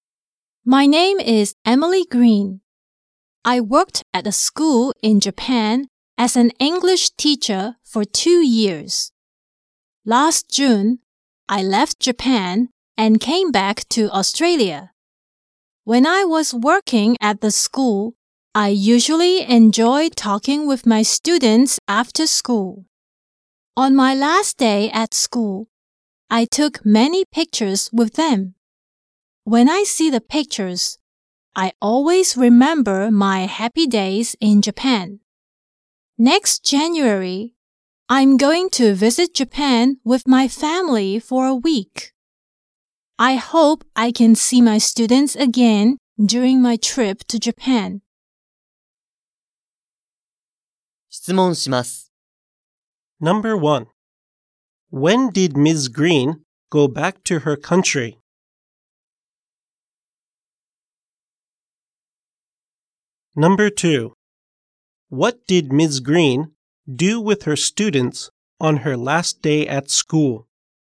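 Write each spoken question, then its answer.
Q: When did Ms. Green go back to her country?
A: Last June

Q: What did Ms. Green do with her students on her last day at school?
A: She took many pictures with them.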